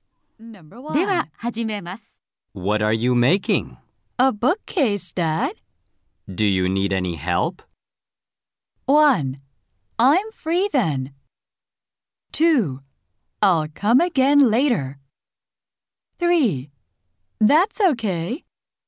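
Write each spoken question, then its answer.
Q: Do you need any help?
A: 3: That's okay.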